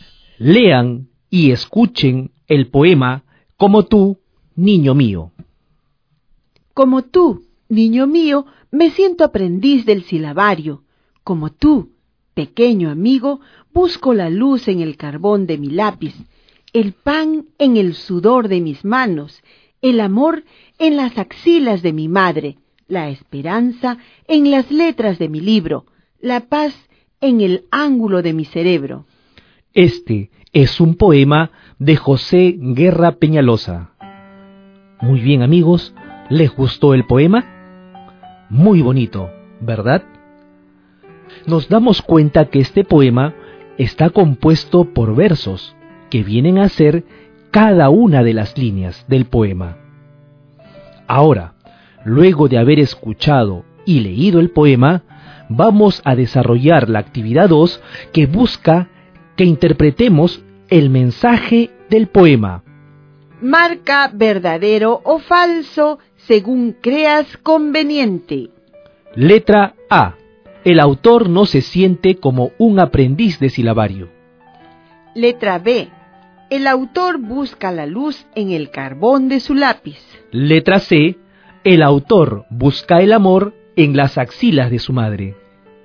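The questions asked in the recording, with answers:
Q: El autor no se siente como un aprendiz de silabario.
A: Falso

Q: El autor busca la luz en el carbón de su lápiz.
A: Verdadero

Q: El autor busca el amor en las axilas de su madre.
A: Verdadero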